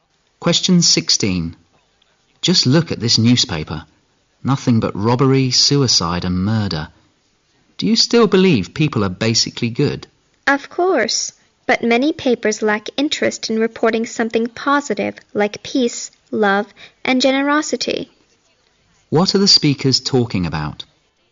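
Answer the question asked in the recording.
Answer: News reports in the papers focusing on negative things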